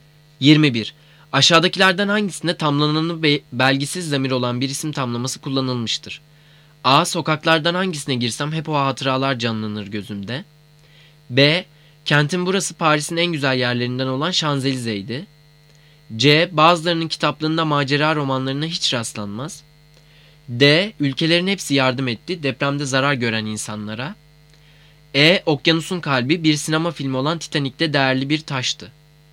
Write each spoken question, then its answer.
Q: Aşağıdakilerden hangisinde tamlananı belgisiz zamir olan bir isim tamlaması kullanılmıştır?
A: Cevap D. Ülkelerin hepsi yardım etti depremde zarar gören insanlara.